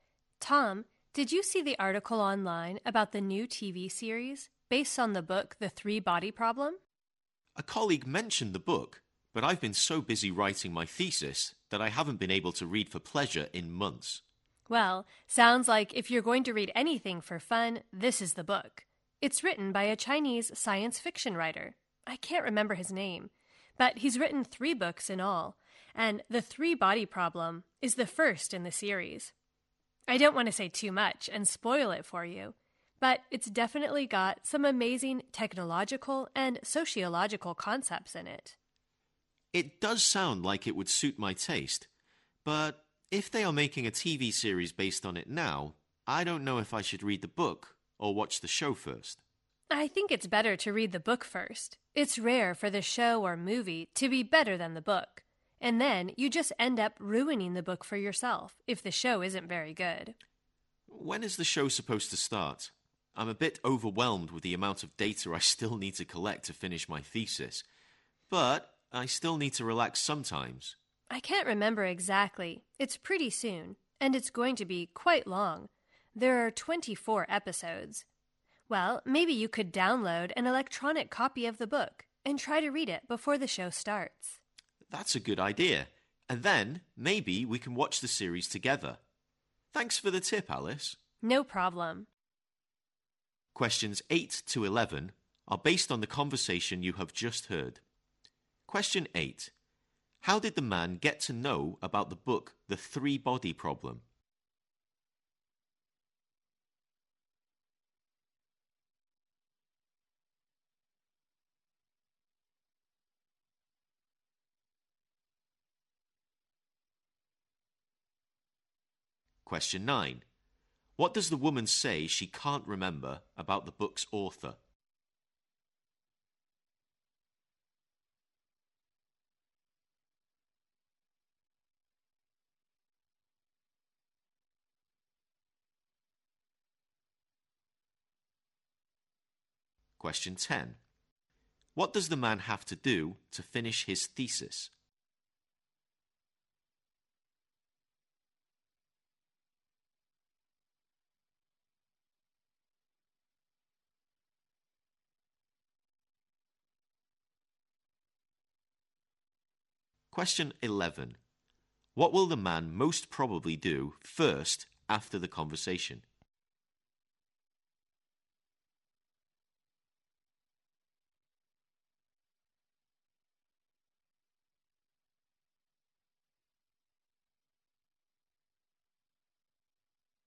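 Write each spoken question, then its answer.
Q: How did the man get to know about the book The Three Body Problem?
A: A colleague mentioned it

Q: What does the woman say she can't remember about the book's author?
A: His name

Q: What does the man have to do to finish his thesis?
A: Collect a lot more data

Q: What will the man most probably do first after the conversation?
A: Download an electronic copy of the book and read it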